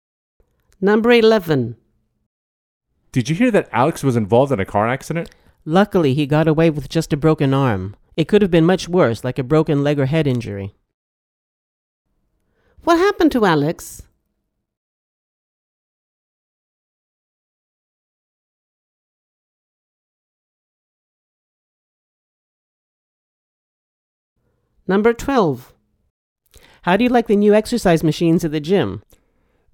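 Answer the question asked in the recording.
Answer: He broke his arm in a car accident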